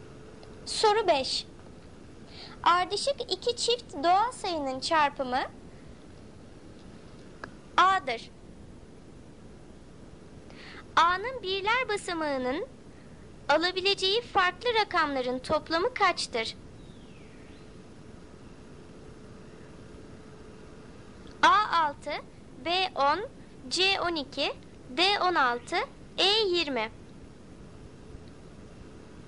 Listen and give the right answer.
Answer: Doğru cevap C 12.